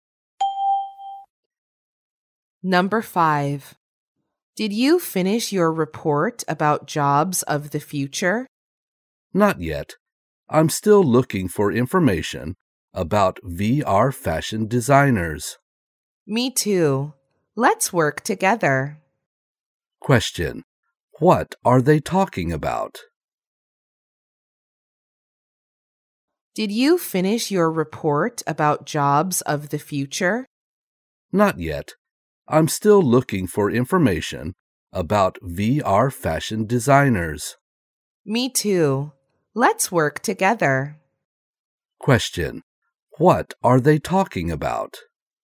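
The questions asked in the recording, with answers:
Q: What are they talking about?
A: Their reports about jobs of the future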